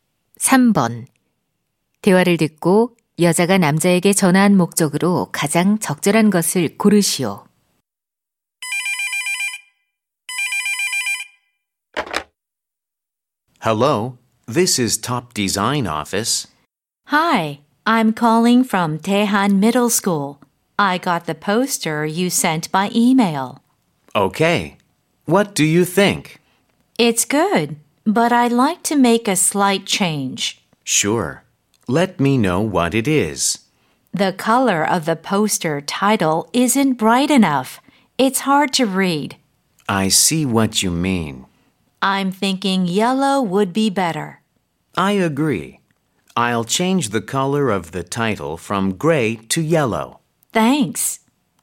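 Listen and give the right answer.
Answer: 포스터 제목 색상 변경을 요청하려고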